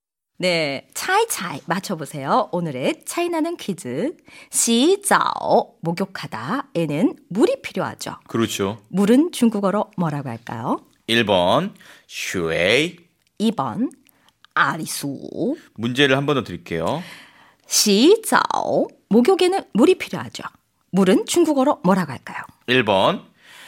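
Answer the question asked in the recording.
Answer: 1: 슈에이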